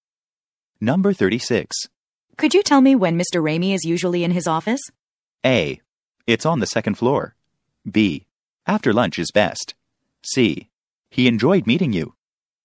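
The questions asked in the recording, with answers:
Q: Could you tell me when Mr. Ramey is usually in his office?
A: B: After lunch is best.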